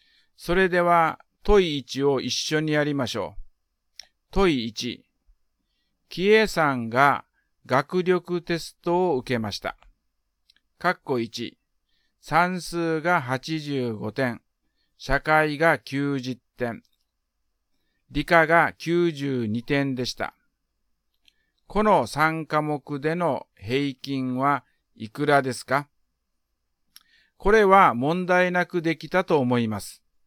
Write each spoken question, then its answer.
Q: この3科目での平均はいくらですか?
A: 89点が答えです。